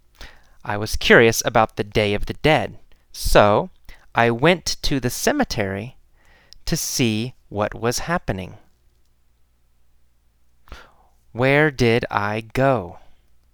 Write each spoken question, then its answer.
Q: Where did I go?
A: To the cemetery. I went to the cemetery.